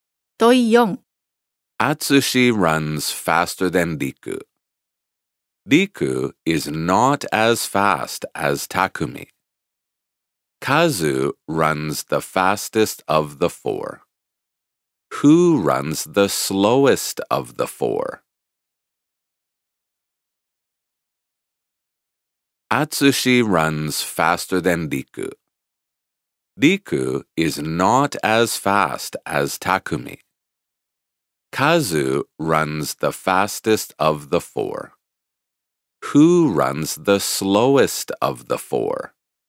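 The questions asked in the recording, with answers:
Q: Who runs the slowest of the four?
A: Riku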